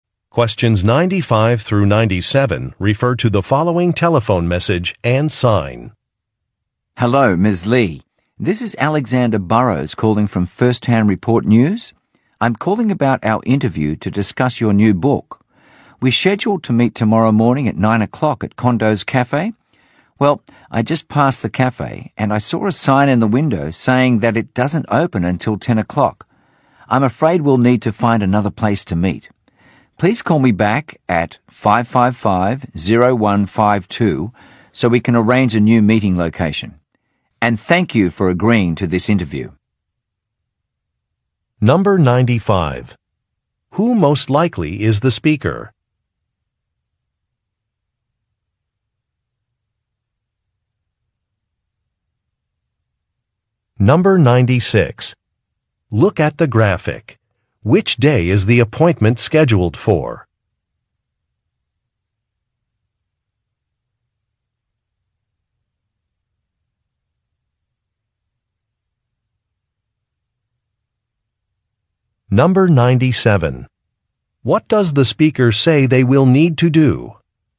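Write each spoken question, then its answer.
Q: Who most likely is the speaker?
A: A news reporter

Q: What does the speaker say they will need to do?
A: Find another place to meet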